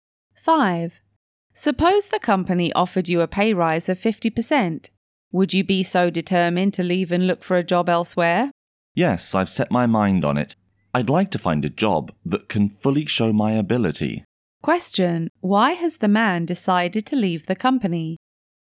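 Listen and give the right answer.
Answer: He wants a job that can fully show his ability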